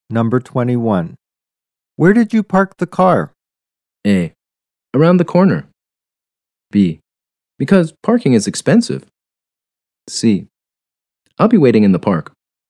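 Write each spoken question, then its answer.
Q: Where did you park the car?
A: A: Around the corner.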